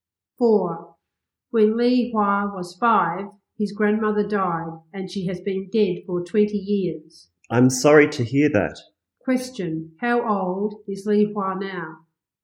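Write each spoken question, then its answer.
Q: how old is Li Hua now?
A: 25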